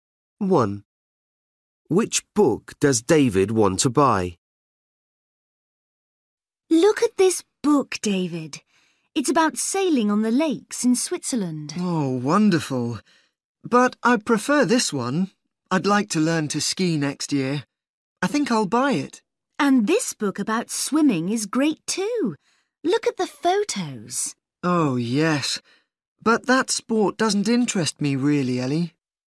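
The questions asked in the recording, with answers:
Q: Which book does David want to buy?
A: The book about skiing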